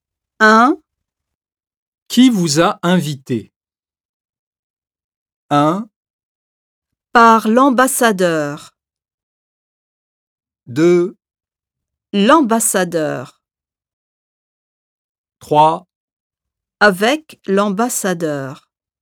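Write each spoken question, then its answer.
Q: Qui vous a invité?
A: 2: L'ambassadeur.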